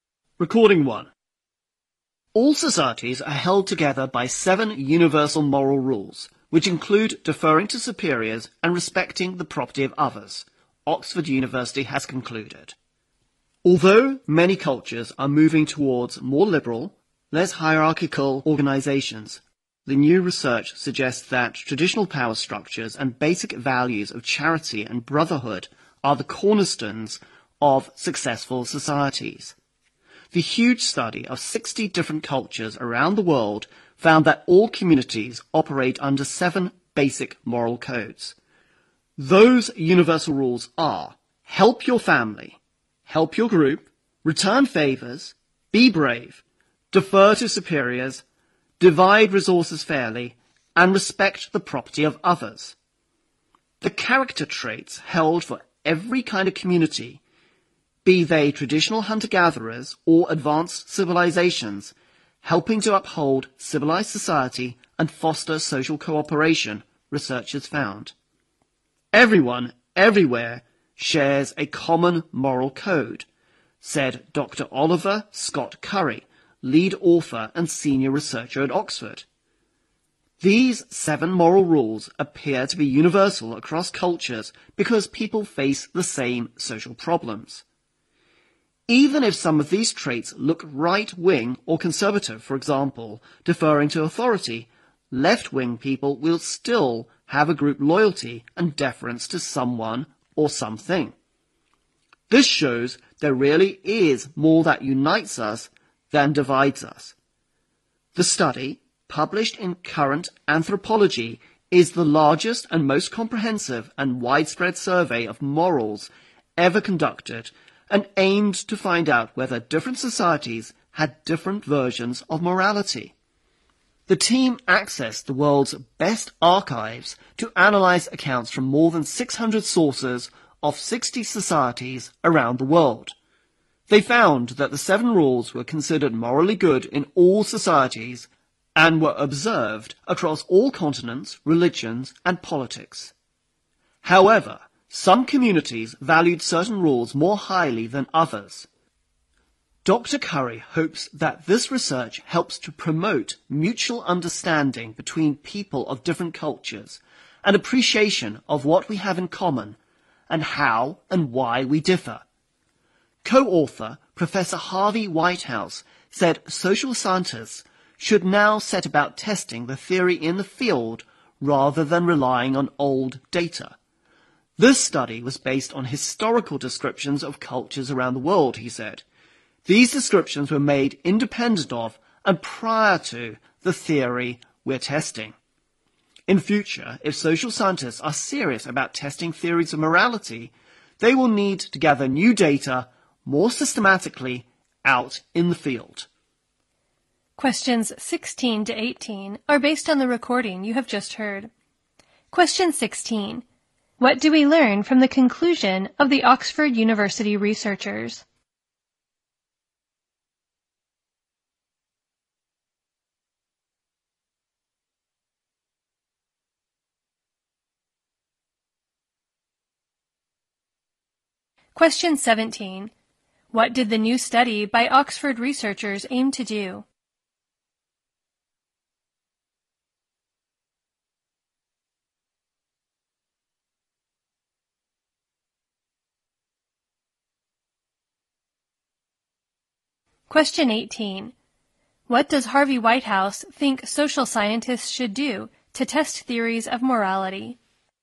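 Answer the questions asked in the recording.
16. All societies are held together by seven universal moral rules
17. Find out whether different societies had different versions of morality
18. Gather new data systematically out in the field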